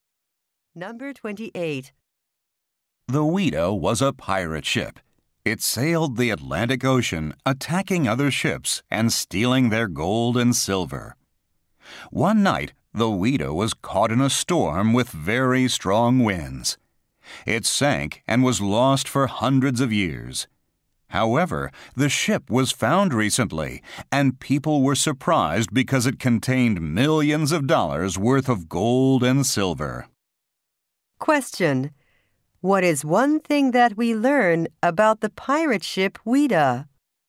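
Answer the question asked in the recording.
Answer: It was found recently with millions of dollars of gold and silver.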